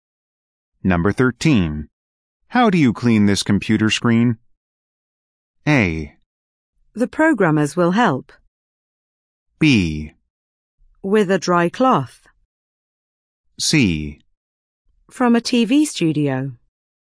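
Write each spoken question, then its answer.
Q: How do you clean this computer screen?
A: B: With a dry cloth.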